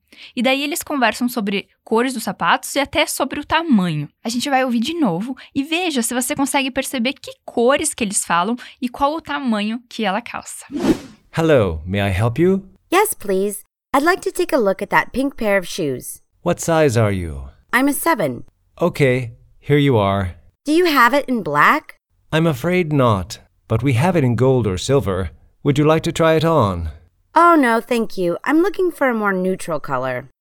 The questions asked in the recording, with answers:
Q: veja se você consegue perceber que cores que eles falam e qual o tamanho que ela calça.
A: Ela diz: I'm a seven.